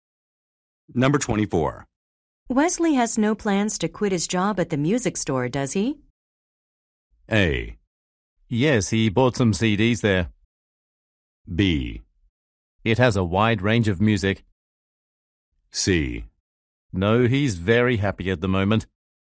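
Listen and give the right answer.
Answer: C: No, he's very happy at the moment.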